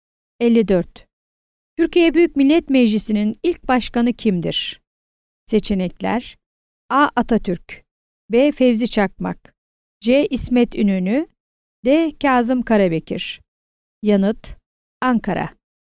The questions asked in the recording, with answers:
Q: Türkiye Büyük Millet Meclisi'nin ilk başkanı kimdir?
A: Yanıt: Ankara.